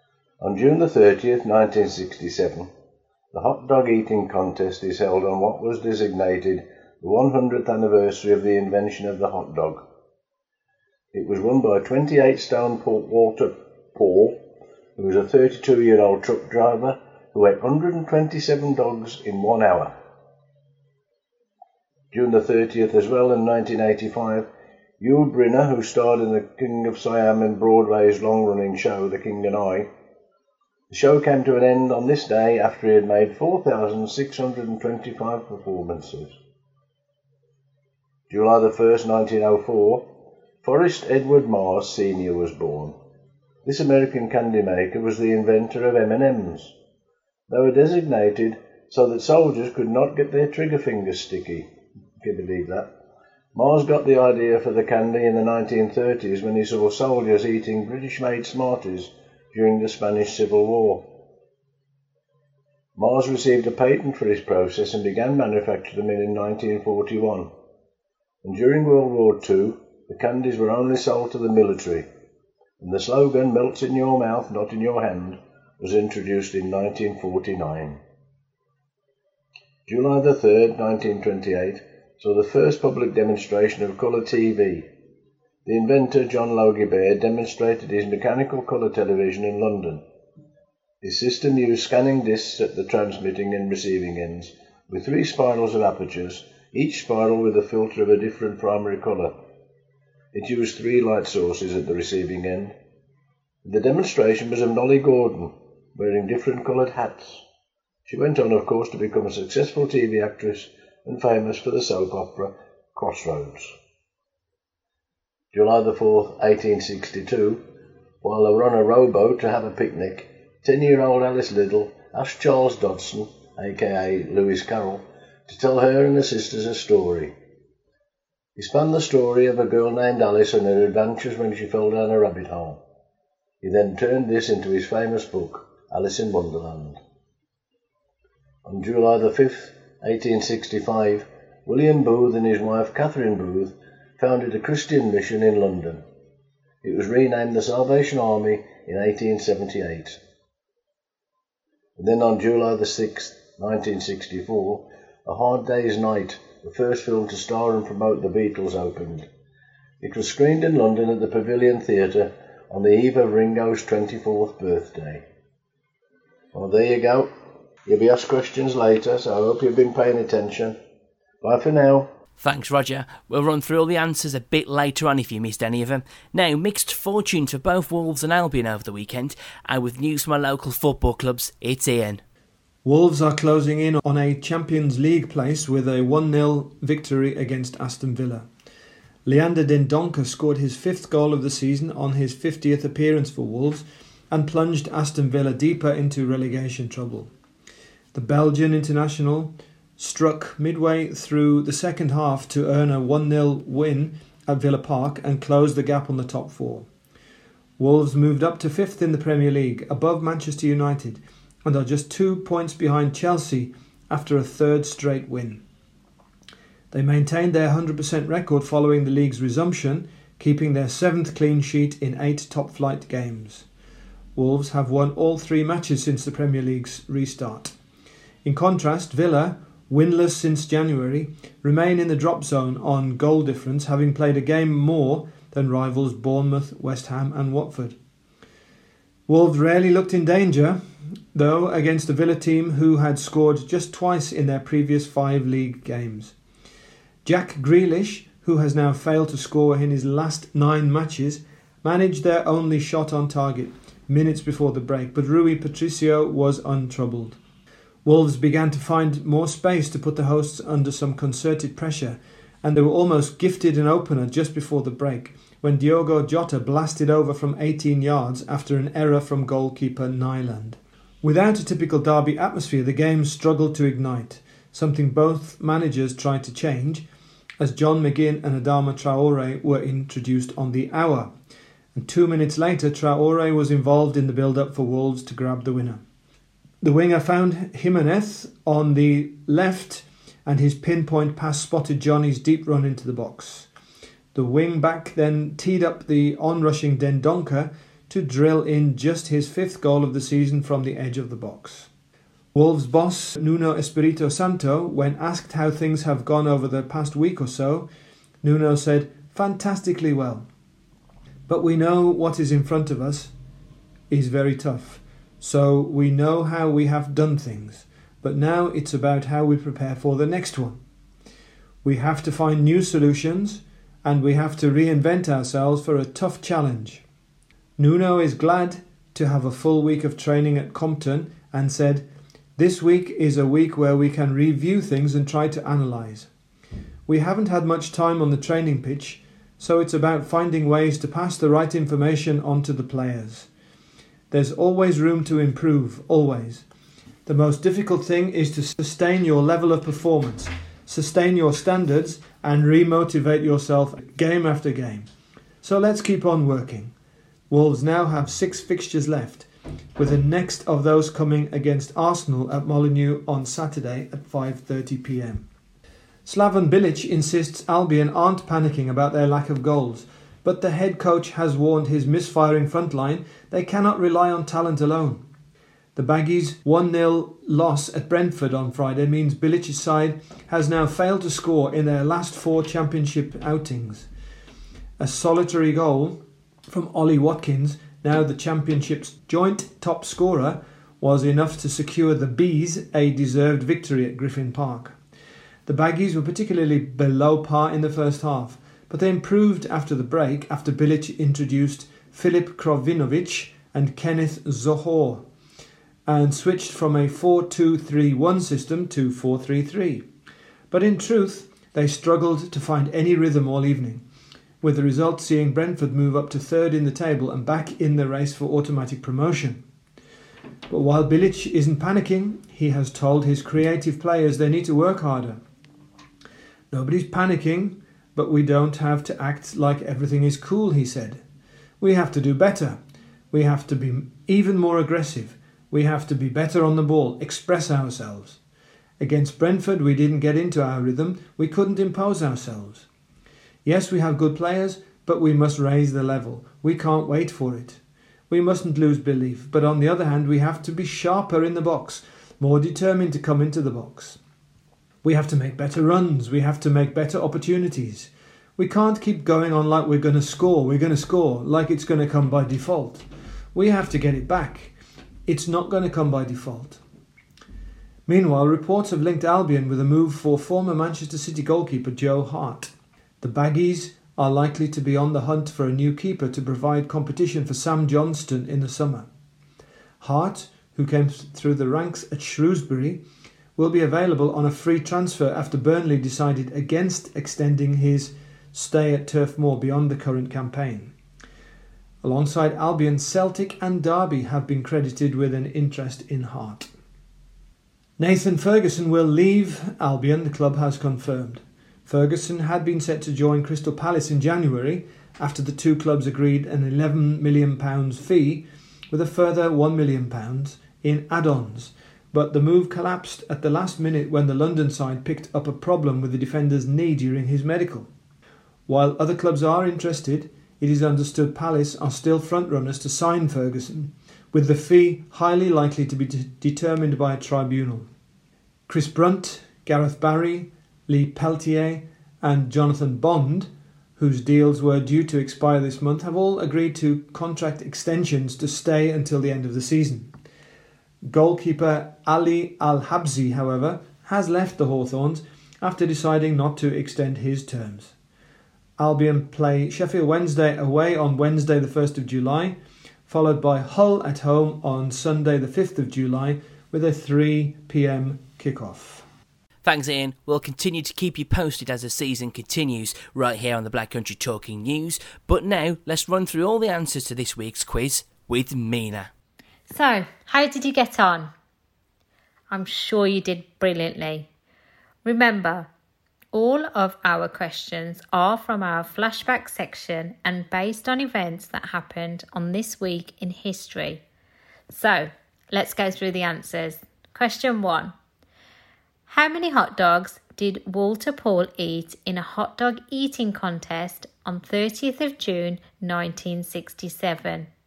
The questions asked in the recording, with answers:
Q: How many hot dogs did Walter Paul eat in a hot dog eating contest on 30th of June 1967?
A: And the answer is 127.